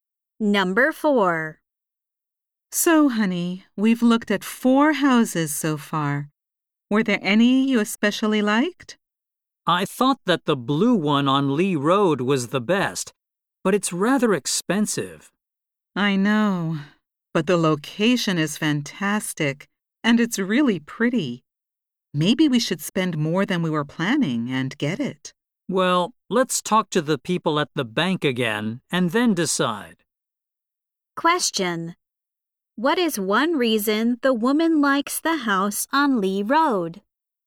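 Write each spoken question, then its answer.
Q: What is one reason the woman likes the house on Lee Road?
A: Its location is fantastic.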